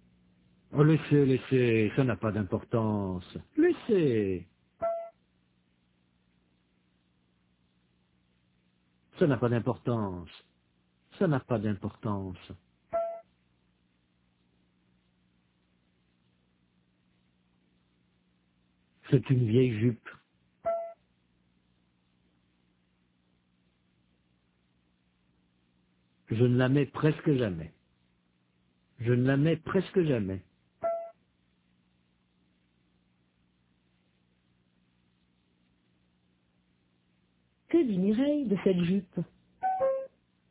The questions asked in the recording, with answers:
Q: Que dit Mireille de cette jupe?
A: Qu'elle ne la met presque jamais.